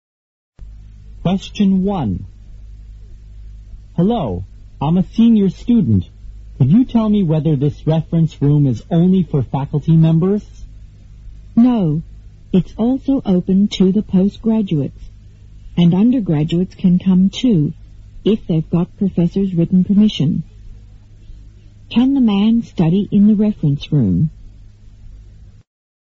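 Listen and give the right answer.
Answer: Yes, if he gets a professor's written permission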